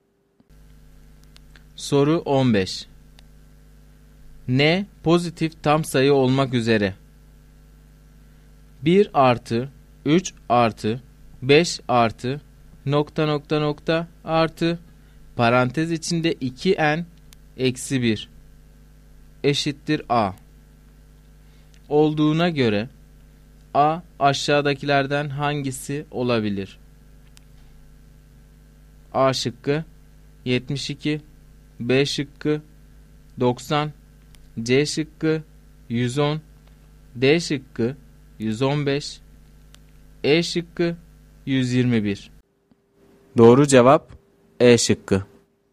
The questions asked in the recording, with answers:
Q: N pozitif tam sayı olmak üzere 1 artı 3 artı 5 artı nokta nokta nokta artı parantez içinde 2n eksi 1 eşittir A olduğuna göre A aşağıdakilerden hangisi olabilir?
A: Doğru cevap E şıkkı.